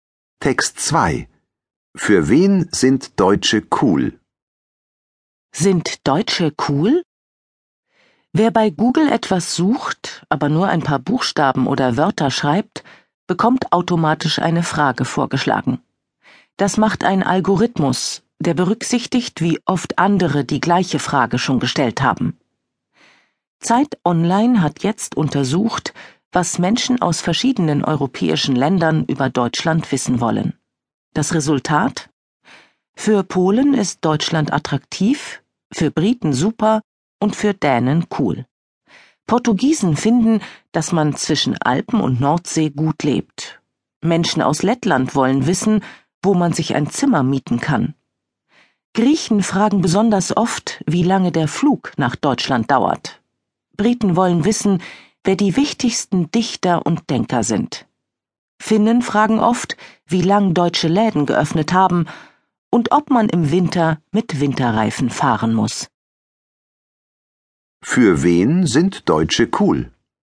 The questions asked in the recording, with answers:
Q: Für wen sind Deutsche cool?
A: Für die Dänen.